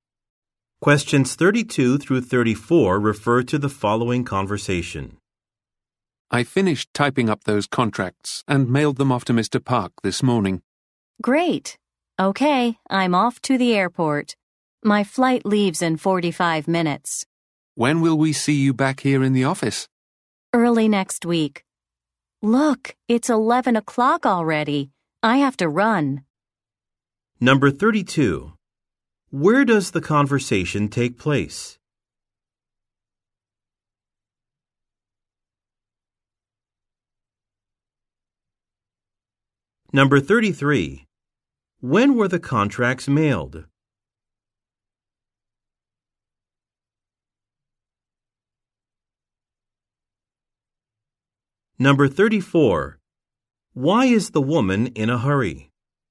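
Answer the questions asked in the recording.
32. In an office
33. This morning
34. She has a flight to catch in 45 minutes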